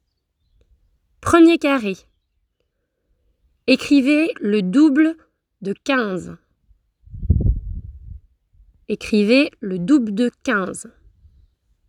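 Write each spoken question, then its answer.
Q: Écrivez le double de 15.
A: 30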